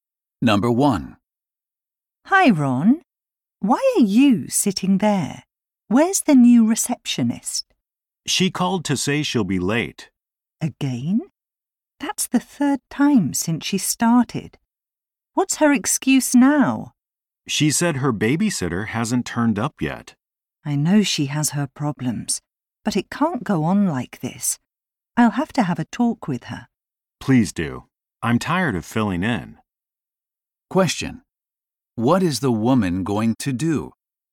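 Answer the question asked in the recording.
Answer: Talk with the new receptionist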